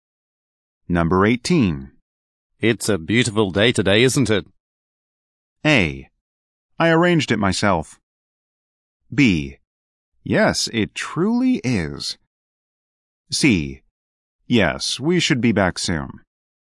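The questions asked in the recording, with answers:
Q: It's a beautiful day today, isn't it?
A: B: Yes, it truly is.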